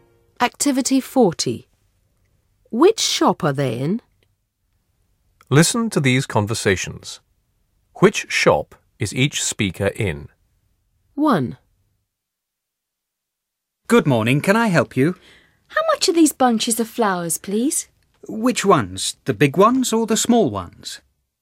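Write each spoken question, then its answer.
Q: Which shop is each speaker in?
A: a flower shop (florist's)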